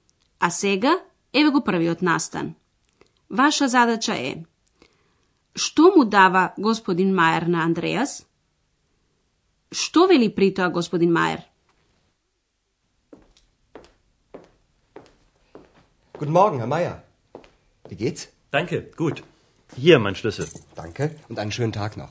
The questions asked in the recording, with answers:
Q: Што му дава господин Мајер на Андреас?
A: Господин Майер го остава клучот и вели: Еве, мојот клуч.